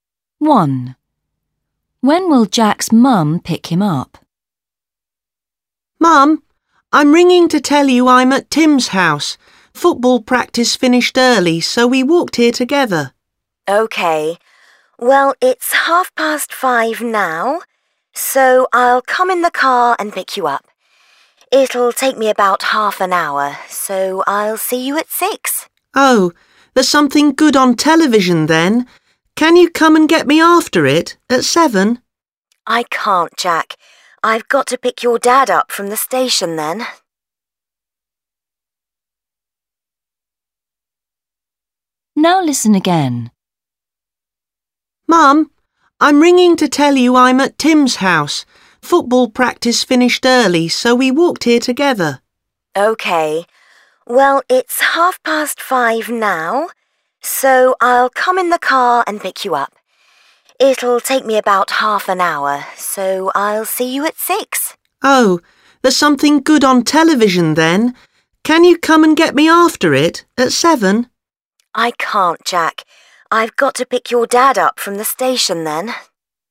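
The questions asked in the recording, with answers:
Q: When will Jack's mum pick him up?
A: at 6 o'clock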